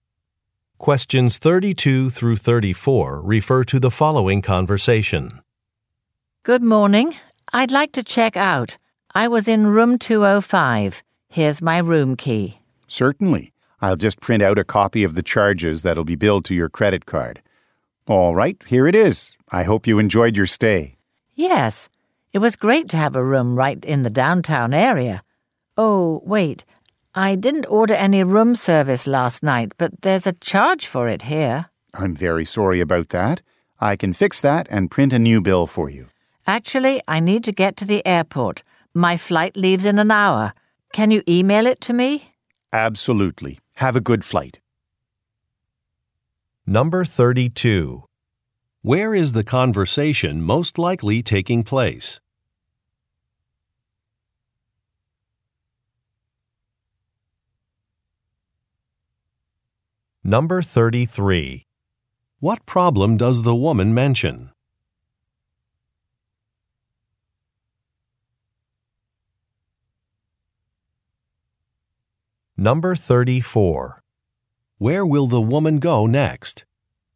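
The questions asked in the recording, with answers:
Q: Where is the conversation most likely taking place?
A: At a hotel

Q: What problem does the woman mention?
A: An incorrect room service charge on her bill

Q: Where will the woman go next?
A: To the airport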